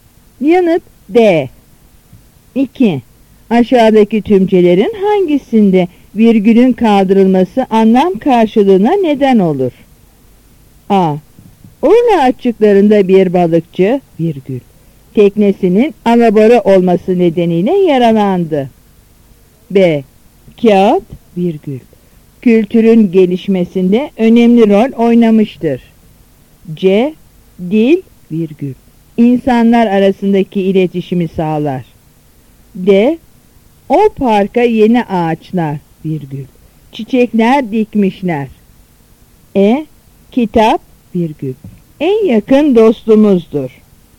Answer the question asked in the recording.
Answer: Yanıt A.